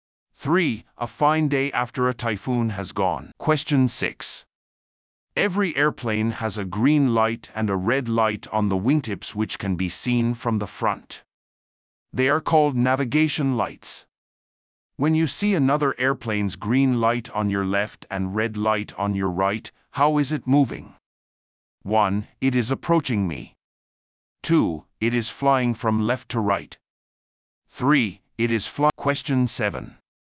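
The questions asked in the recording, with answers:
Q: When you see another airplane's green light on your left and red light on your right, how is it moving?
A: 1: It is approaching me.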